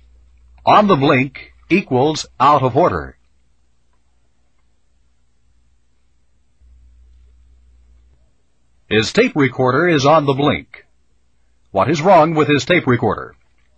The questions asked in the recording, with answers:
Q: What is wrong with his tape recorder?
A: It is on the blink.